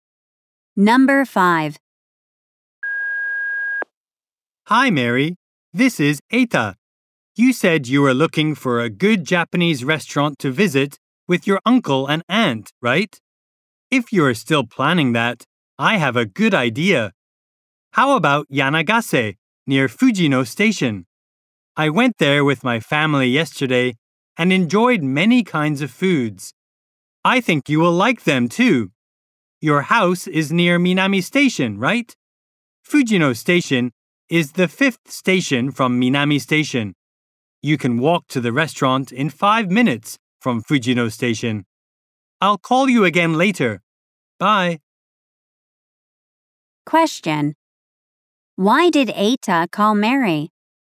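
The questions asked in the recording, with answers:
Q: Why did Eita call Mary?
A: To recommend a Japanese restaurant, Yanagase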